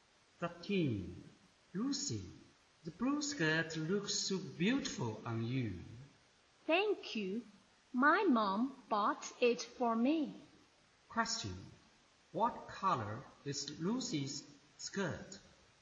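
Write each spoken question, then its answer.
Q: What color is Lucy's skirt?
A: Blue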